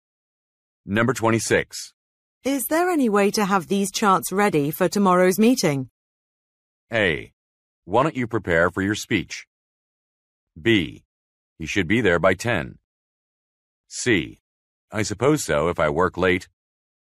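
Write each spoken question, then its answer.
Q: Is there any way to have these charts ready for tomorrow's meeting?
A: C: I suppose so if I work late.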